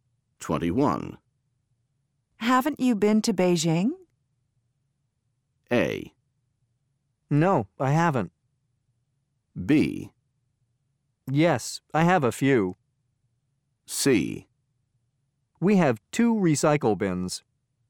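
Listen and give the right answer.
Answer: A: No, I haven't.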